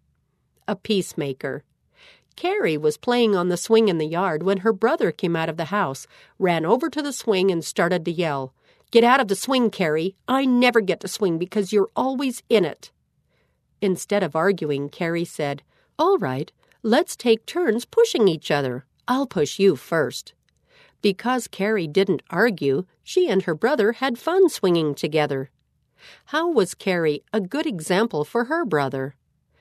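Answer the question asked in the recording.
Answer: She didn't argue and offered to take turns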